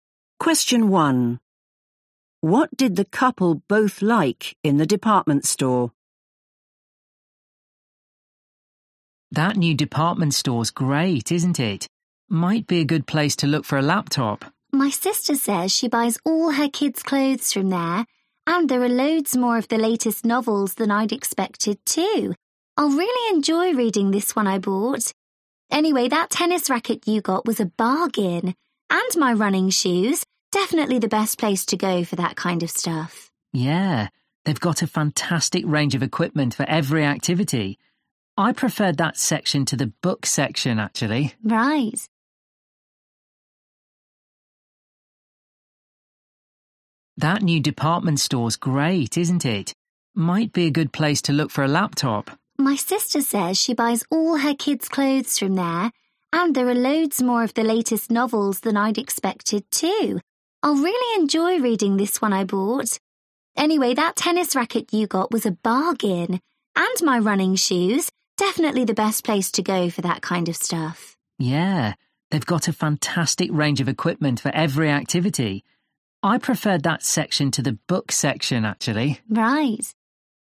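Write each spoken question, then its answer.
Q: What did the couple both like in the department store?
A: the sports equipment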